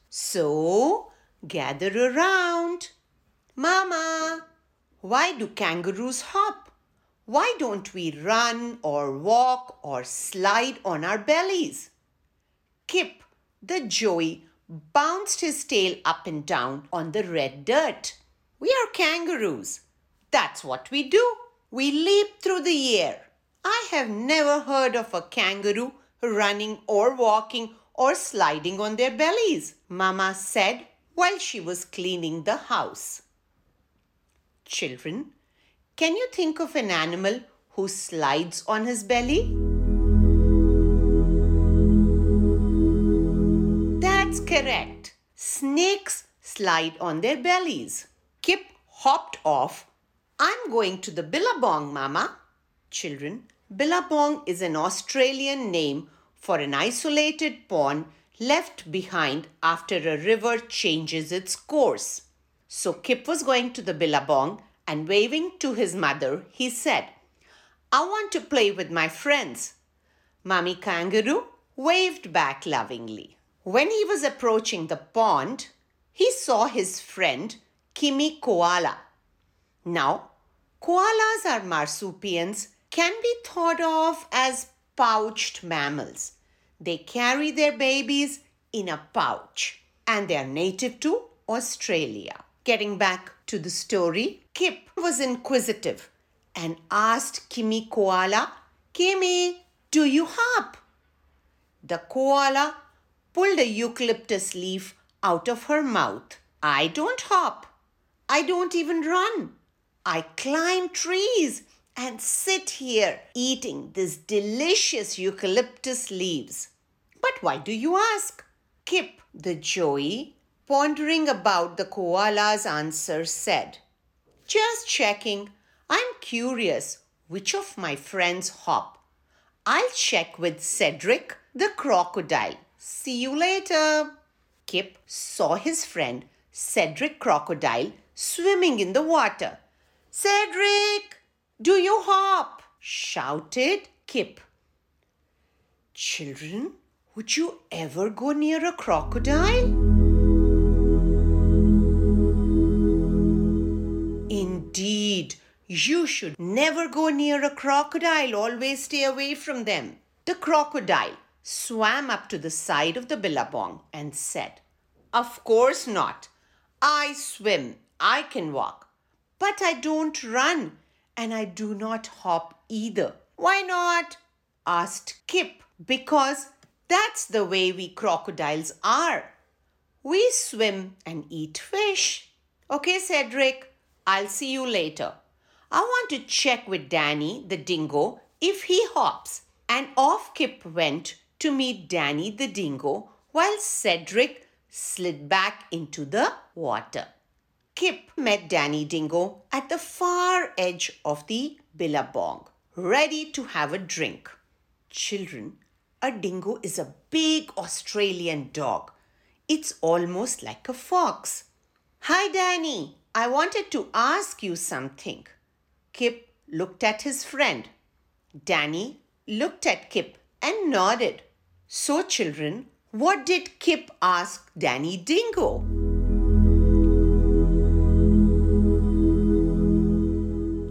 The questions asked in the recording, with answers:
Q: So, children, what did Kip ask Danny Dingo?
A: Yes, indeed. Kip asked Danny, do you hop?